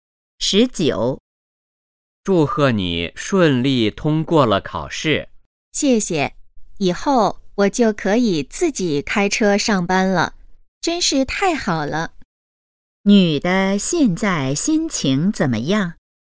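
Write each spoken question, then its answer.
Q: 女的现在心情怎么样?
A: 很高兴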